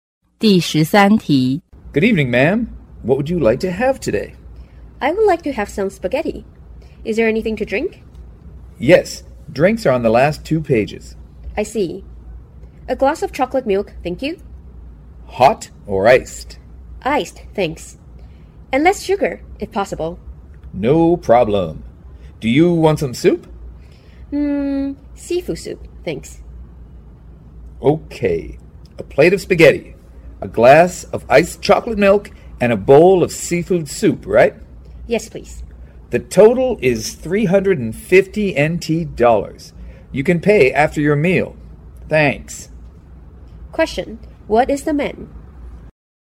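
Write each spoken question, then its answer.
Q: Question, what is the man?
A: A waiter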